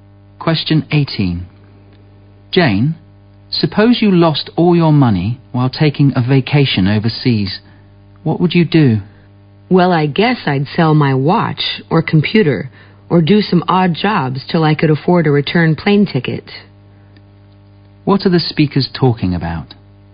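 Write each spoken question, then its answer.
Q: What are the speakers talking about?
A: What to do if you lost all your money on a holiday abroad.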